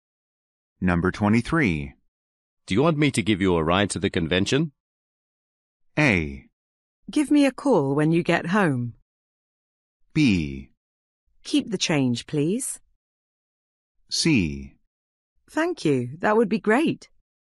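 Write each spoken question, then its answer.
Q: Do you want me to give you a ride to the convention?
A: C: Thank you. That would be great.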